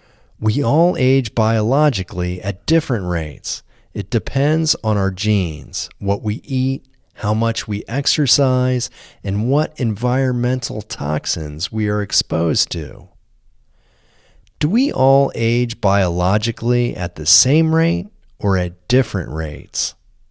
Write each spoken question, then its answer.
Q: Do we all age biologically at the same rate or at different rates?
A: We all age biologically at different rates.